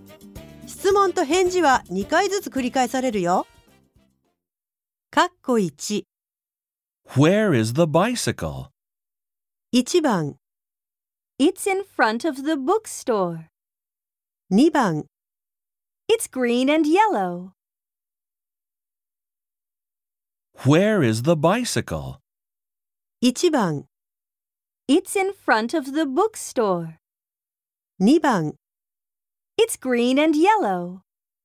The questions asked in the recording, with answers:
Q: Where is the bicycle?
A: 答えは1番の It's in front of the bookstore。